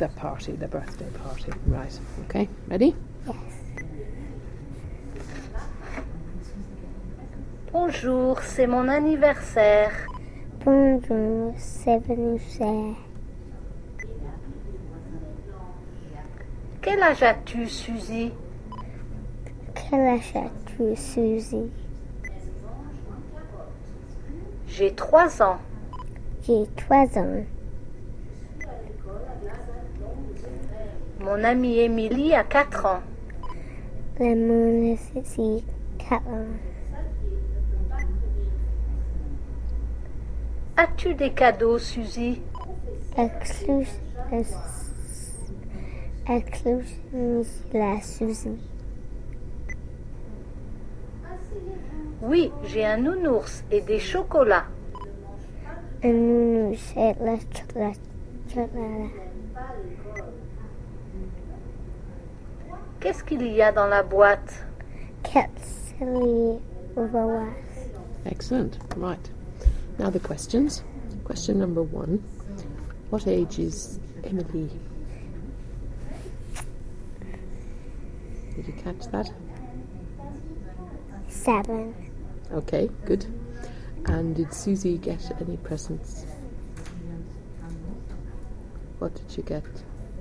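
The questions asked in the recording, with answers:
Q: And did Susie get any presents?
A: Yes, a teddy and chocolates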